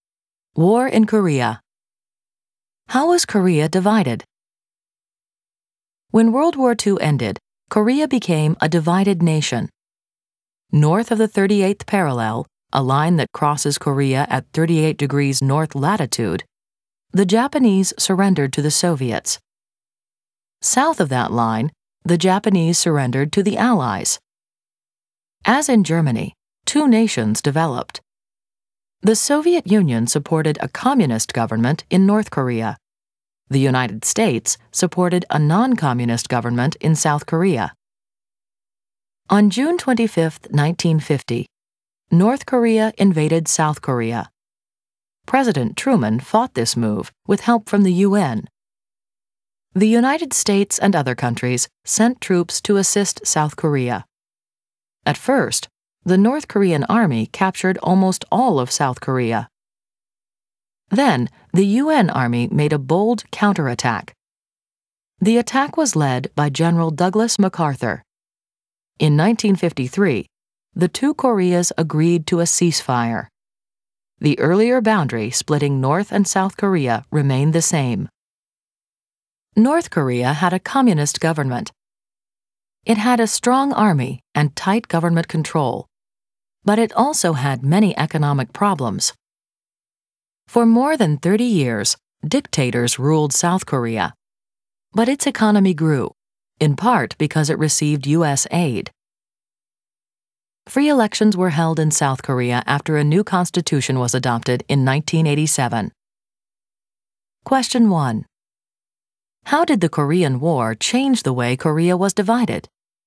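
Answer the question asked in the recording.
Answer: It did not change it; the boundary at the 38th parallel stayed the same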